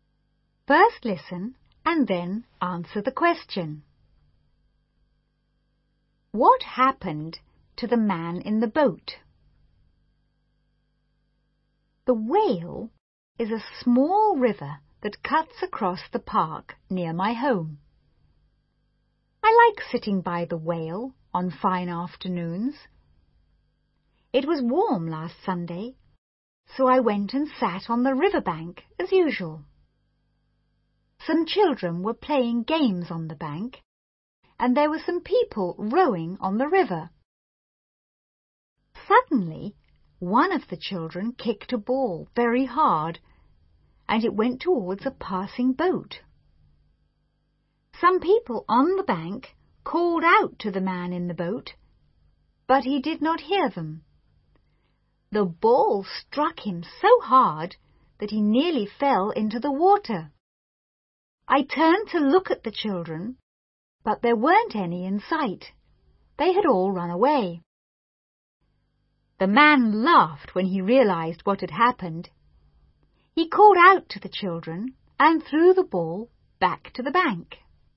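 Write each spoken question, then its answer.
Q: What happened to the man in the boat?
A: A ball kicked by a child struck him so hard that he nearly fell into the water.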